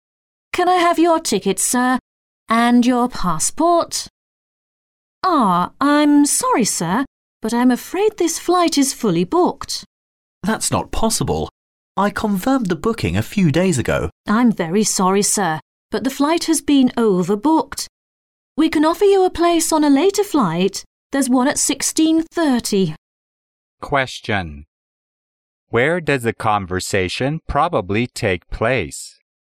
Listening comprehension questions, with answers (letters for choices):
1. Where does the conversation probably take place?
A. At a railway station.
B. At a travel agency.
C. At an airport.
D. At a cinema.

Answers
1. C

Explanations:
文中提到flight、ticket、passport、booking等可知此对话发生在机场,故选C。

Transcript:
W: Can I have your ticket, sir? And your passport?...Ah, I'm sorry, sir, but I'm afraid this flight is fully booked.
M: That's not possible. I confirmed the booking a few days ago.
W: I'm very sorry, sir, but the flight has been overbooked. We can offer you a place on a later flight. There's one at 16:30.
Question: Where does the conversation probably take place?